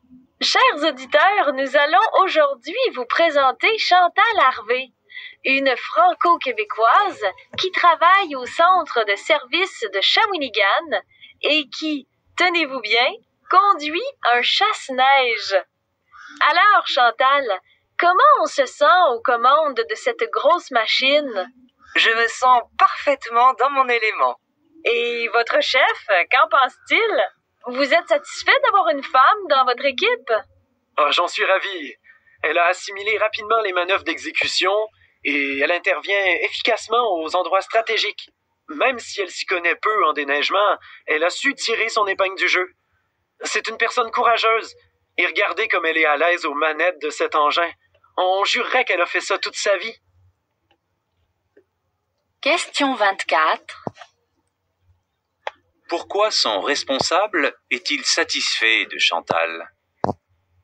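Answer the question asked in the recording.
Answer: Elle a vite appris les manœuvres et intervient efficacement aux endroits stratégiques.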